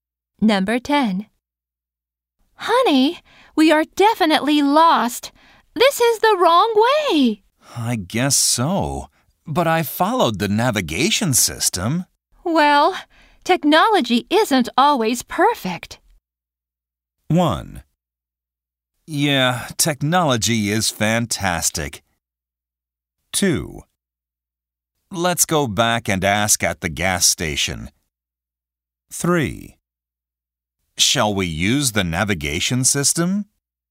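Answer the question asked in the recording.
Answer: 2: Let's go back and ask at the gas station.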